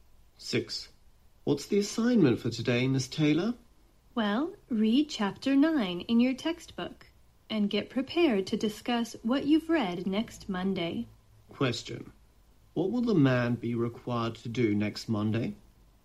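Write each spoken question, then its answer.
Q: What will the man be required to do next Monday?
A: Discuss Chapter 9 of the textbook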